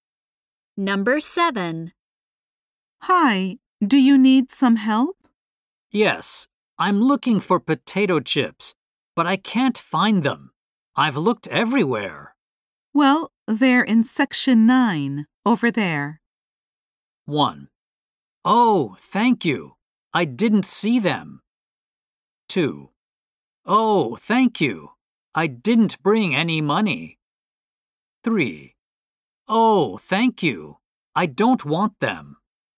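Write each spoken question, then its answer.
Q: Well, they're in section 9, over there.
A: 1: Oh, thank you. I didn't see them.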